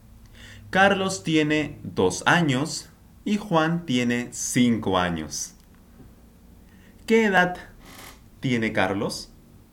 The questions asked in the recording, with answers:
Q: ¿Qué edad tiene Carlos?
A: dos años. Carlos tiene dos años.